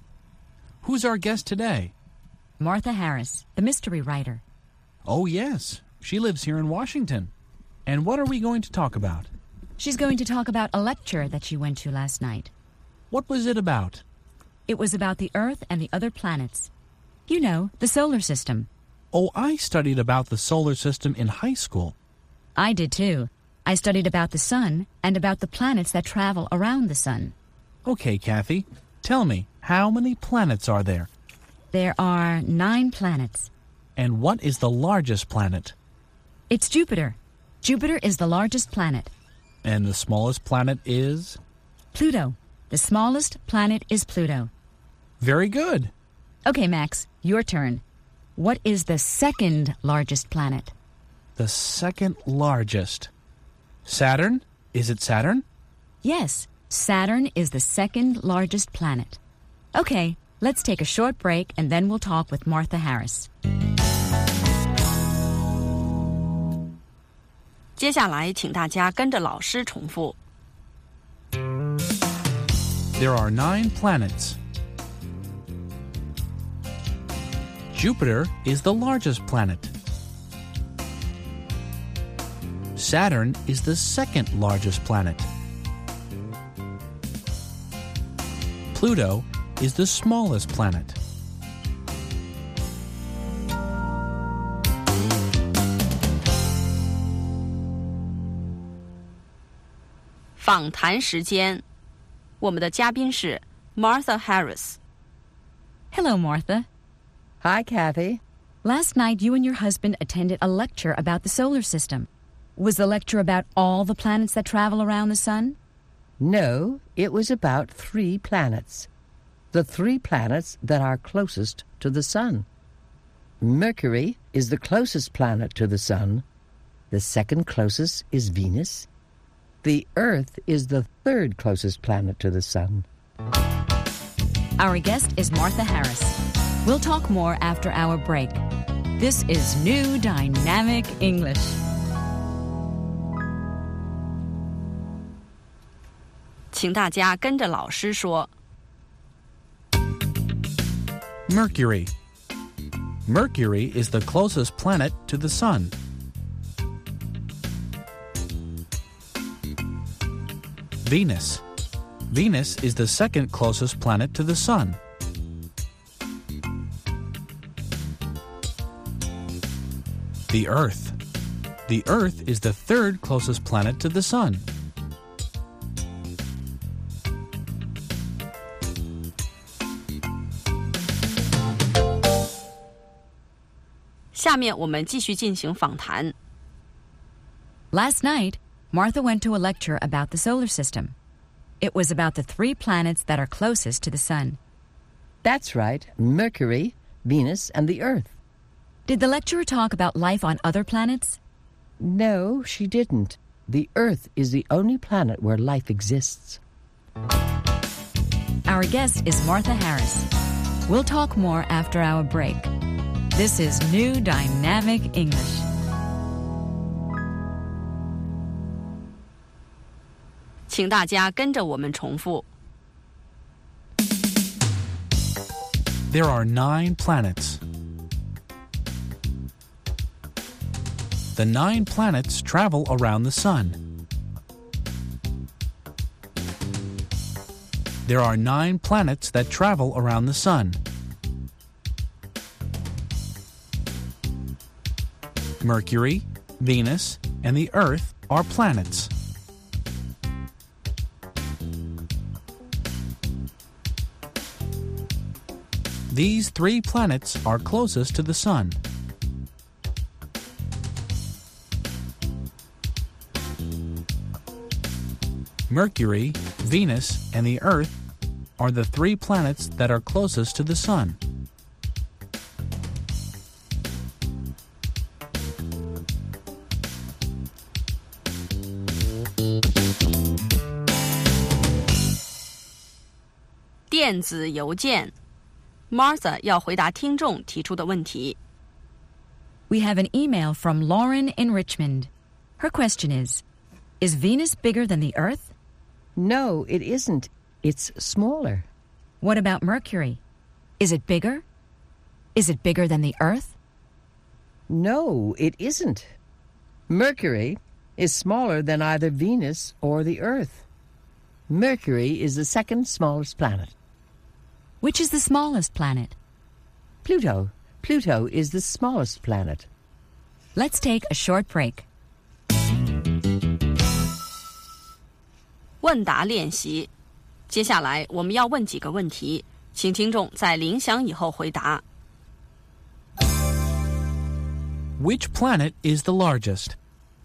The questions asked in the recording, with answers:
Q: Which planet is the largest?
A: Jupiter is the largest planet.